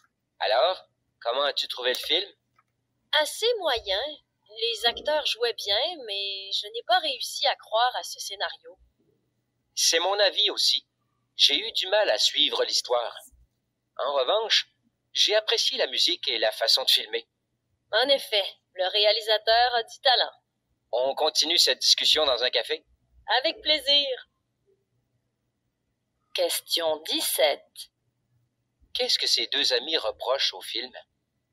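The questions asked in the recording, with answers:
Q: Qu'est-ce que ces deux amis reprochent au film?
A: Le scénario : l'histoire est peu crédible et difficile à suivre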